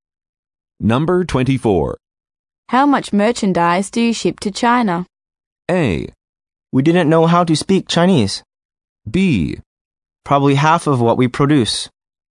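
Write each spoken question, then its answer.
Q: How much merchandise do you ship to China?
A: B: Probably half of what we produce.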